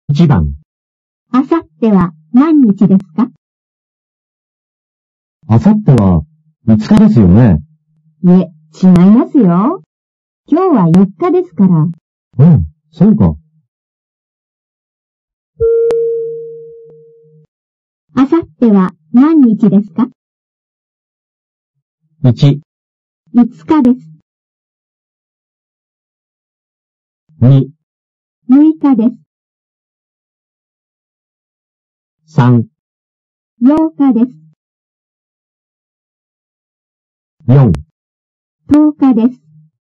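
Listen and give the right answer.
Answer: 2: 6日です。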